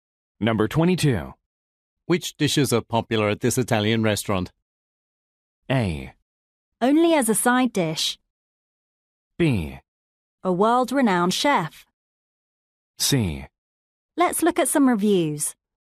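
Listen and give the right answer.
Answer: C: Let's look at some reviews.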